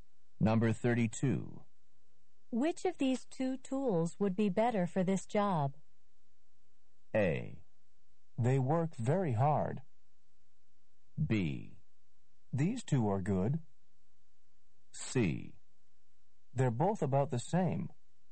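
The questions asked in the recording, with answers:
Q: Which of these two tools would be better for this job?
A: C: They're both about the same.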